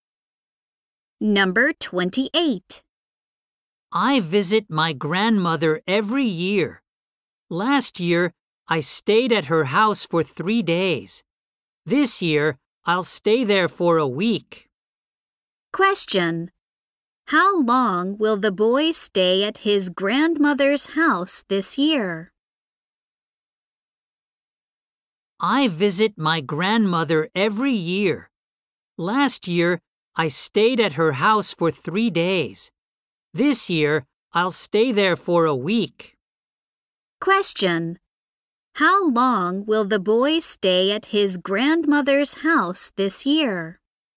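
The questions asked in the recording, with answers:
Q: How long will the boy stay at his grandmother's house this year?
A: For a week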